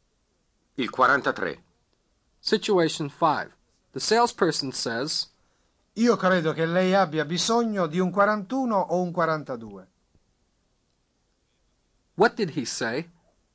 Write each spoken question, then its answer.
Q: What did he say?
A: I believe you need a 41 or a 42.